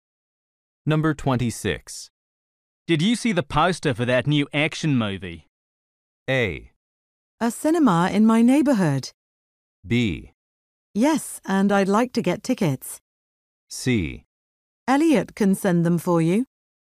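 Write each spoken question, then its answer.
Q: Did you see the poster for that new action movie?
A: B: Yes, and I'd like to get tickets.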